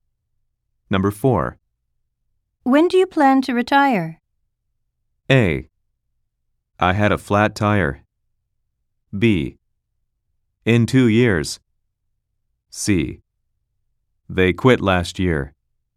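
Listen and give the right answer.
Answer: B: In 2 years.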